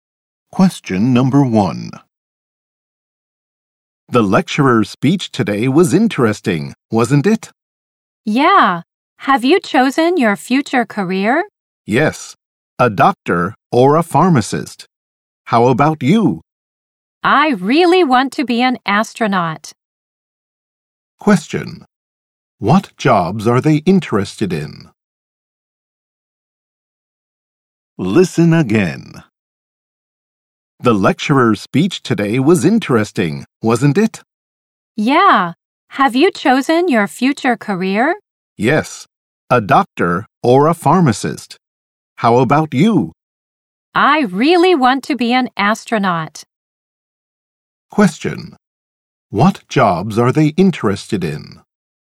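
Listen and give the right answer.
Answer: A doctor or a pharmacist, and an astronaut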